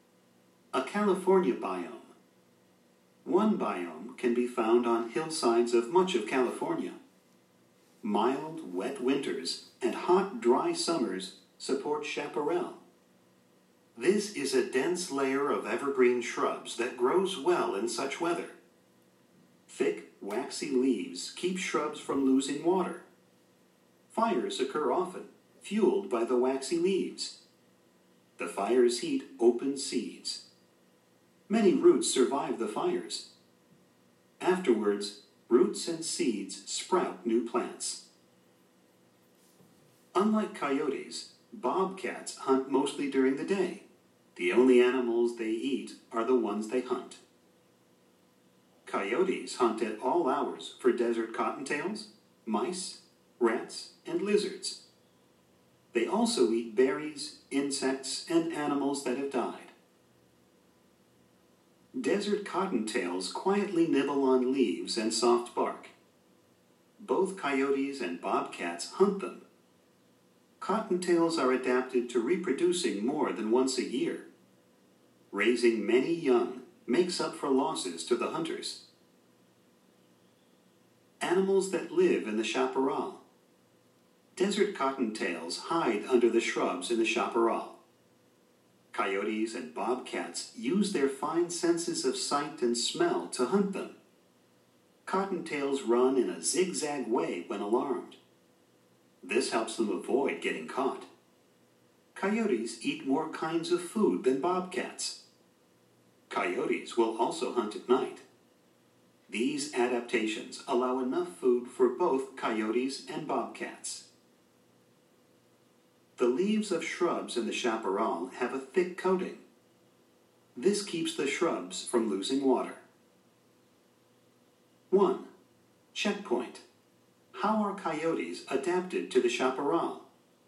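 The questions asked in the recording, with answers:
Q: Checkpoint. How are coyotes adapted to the chaparral?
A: They eat many kinds of food and hunt at all hours, including at night, using fine senses of sight and smell.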